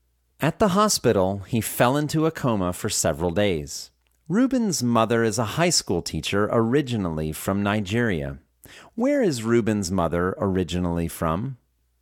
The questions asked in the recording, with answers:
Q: Where is Ruben's mother originally from?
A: Ruben's mother is originally from Nigeria.